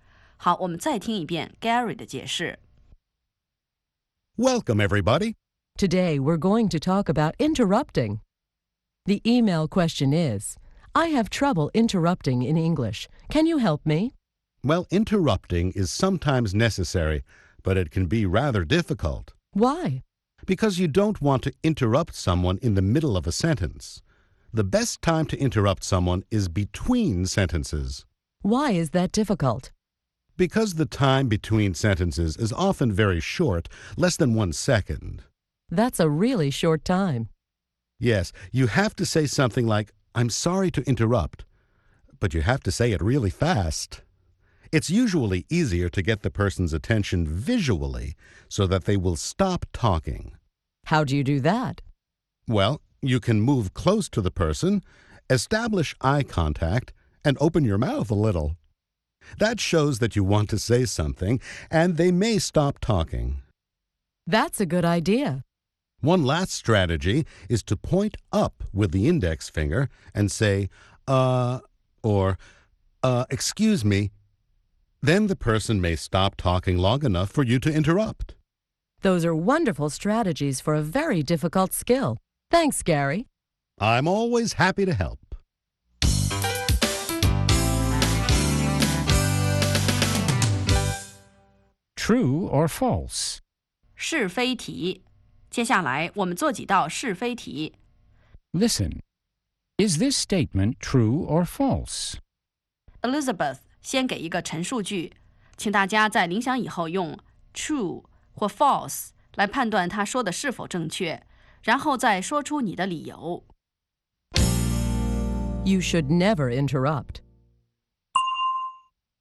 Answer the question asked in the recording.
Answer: False. Interrupting is sometimes necessary.